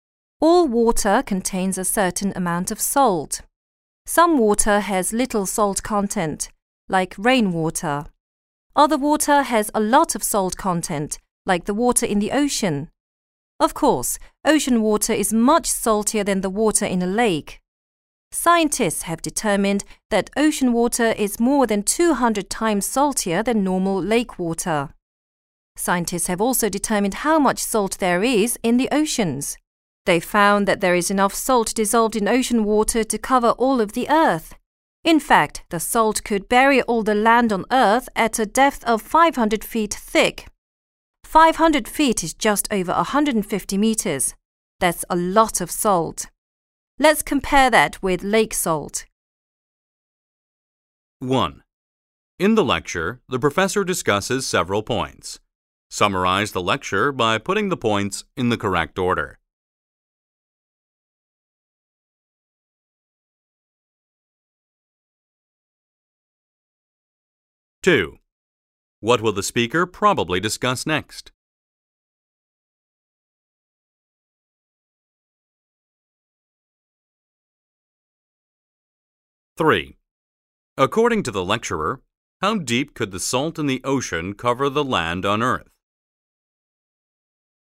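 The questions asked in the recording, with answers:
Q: What will the speaker probably discuss next?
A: How ocean salt compares with the salt in lakes

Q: According to the lecturer, how deep could the salt in the ocean cover the land on Earth?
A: 500 feet (just over 150 meters)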